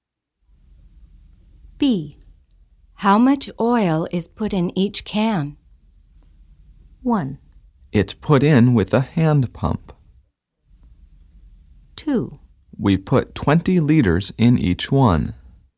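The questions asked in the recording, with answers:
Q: How much oil is put in each can?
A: 2: We put 20 liters in each one.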